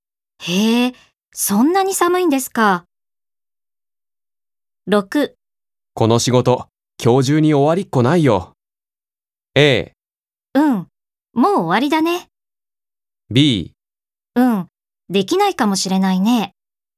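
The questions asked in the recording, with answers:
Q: この仕事、今日中に終わりっこないよ。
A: B: うん、できないかもしれないね。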